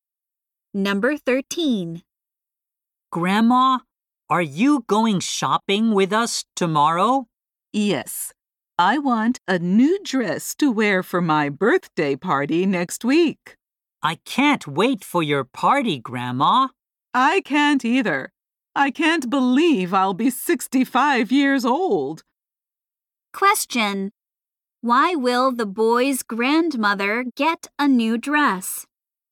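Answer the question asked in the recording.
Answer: To wear at her birthday party next week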